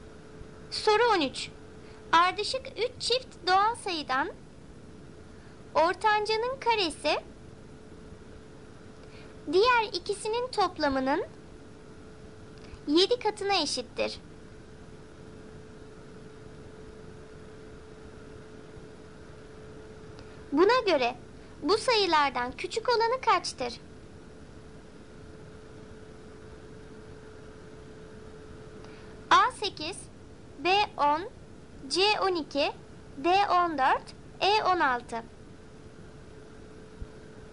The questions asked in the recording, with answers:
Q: Buna göre bu sayılardan küçük olanı kaçtır?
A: Doğru cevap C 12.